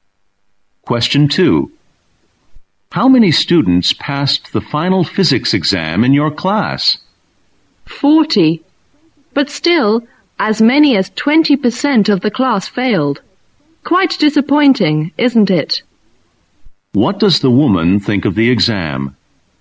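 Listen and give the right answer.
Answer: The results were disappointing.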